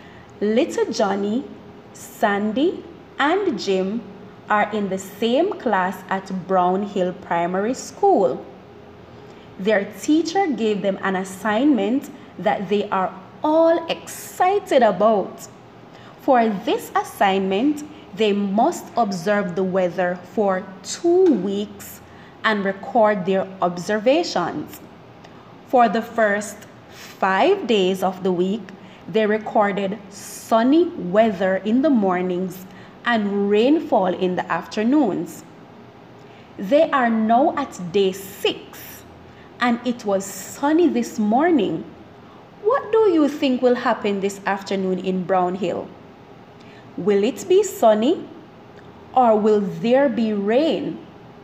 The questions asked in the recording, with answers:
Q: What do you think will happen this afternoon in Brown Hill?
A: My bet is on rainfall because I have noticed a pattern in the weather.